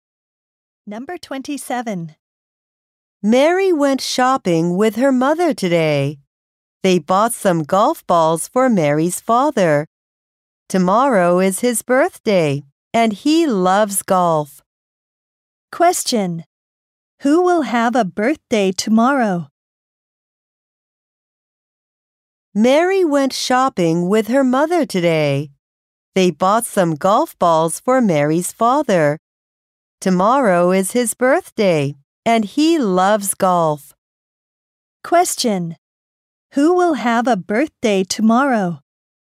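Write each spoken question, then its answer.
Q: Who will have a birthday tomorrow?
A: Mary's father.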